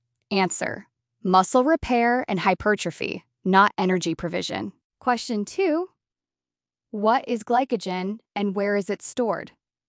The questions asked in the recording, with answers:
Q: Question two, what is glycogen and where is it stored?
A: Answer, glycogen is the stored form of carbohydrate stored in the muscles and liver.